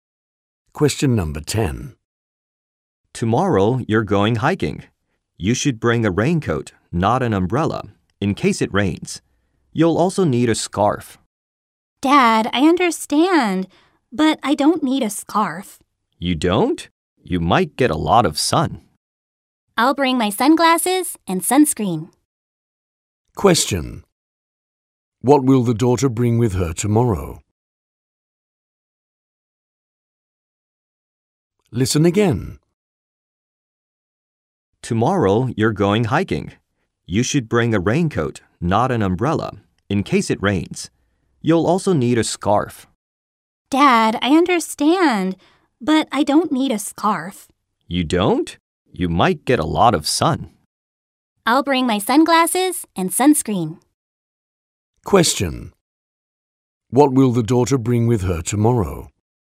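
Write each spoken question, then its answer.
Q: What will the daughter bring with her tomorrow?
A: A raincoat, sunglasses and sunscreen (no scarf)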